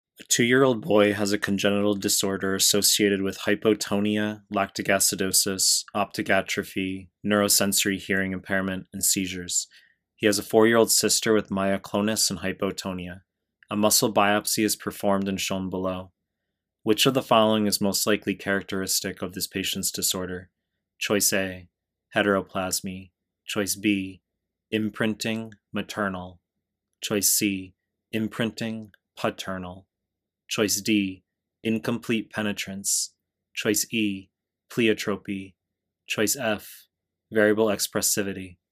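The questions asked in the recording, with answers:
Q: Which of the following is most likely characteristic of this patient's disorder?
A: A: heteroplasmy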